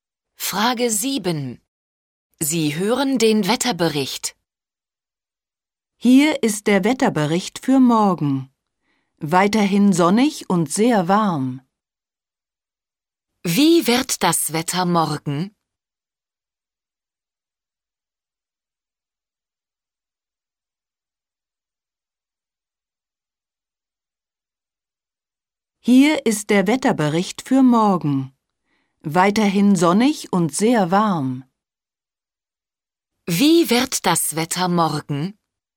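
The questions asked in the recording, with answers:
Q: Wie wird das Wetter morgen?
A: Sonnig und sehr warm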